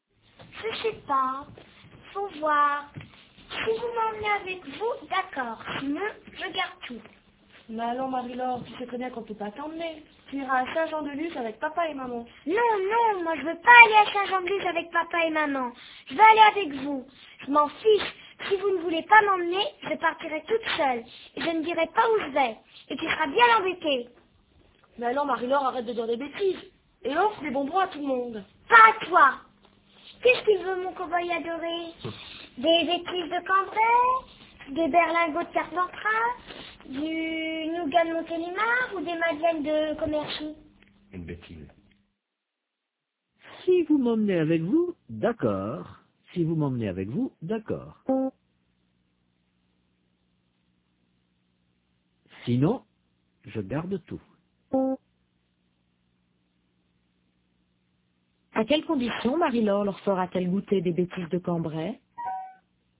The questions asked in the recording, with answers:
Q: À quelles conditions Marie-Laure leur fera-t-elle goûter des bêtises de Cambrai ?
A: À condition qu'ils l'emmènent avec eux.